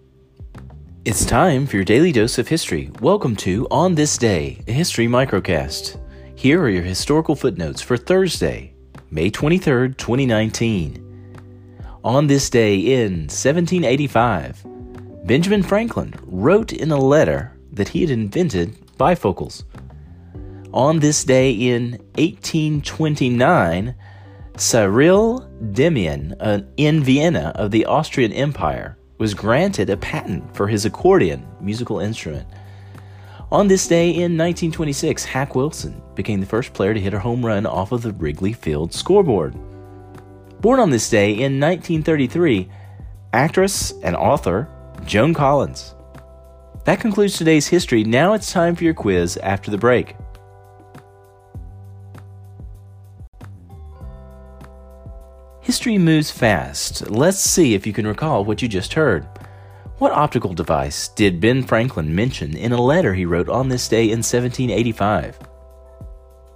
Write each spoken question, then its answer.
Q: What optical device did Ben Franklin mention in a letter he wrote on this day in 1785?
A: bifocals.